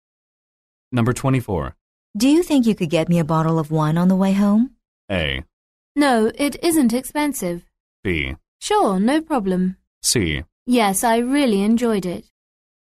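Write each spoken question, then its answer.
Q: Do you think you could get me a bottle of wine on the way home?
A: B: Sure, no problem.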